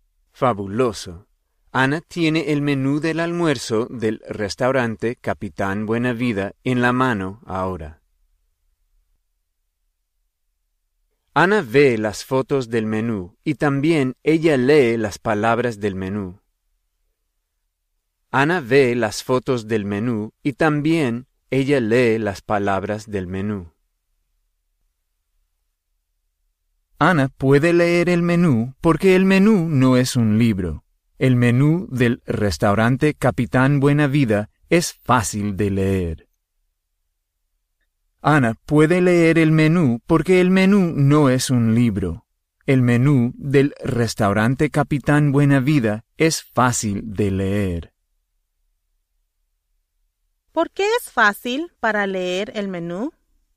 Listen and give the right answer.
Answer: Es fácil de leer el menú porque el menú no es un libro.